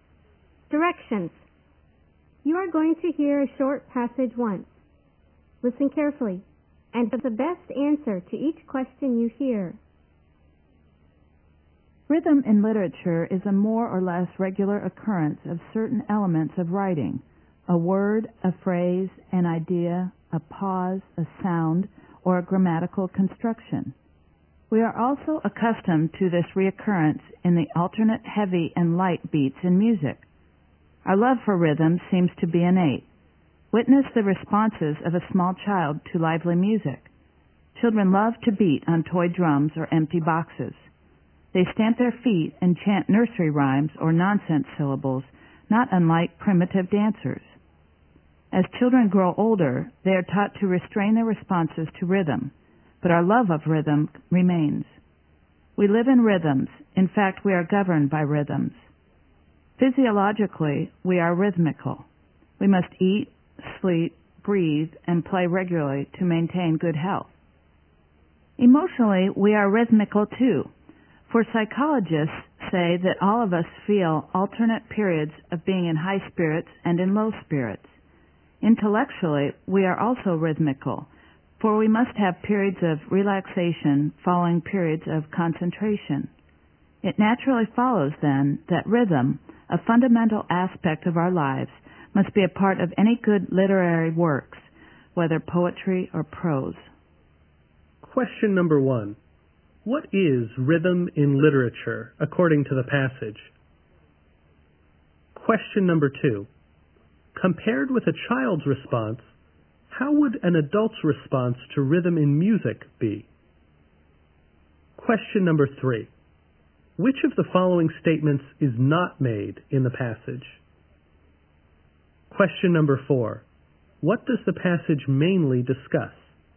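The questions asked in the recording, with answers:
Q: What is rhythm in literature, according to the passage?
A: A more or less regular occurrence of certain elements of writing.

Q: Compared with a child's response, how would an adult's response to rhythm in music be?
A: More restrained.

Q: What does the passage mainly discuss?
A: Rhythm in our lives and in literature.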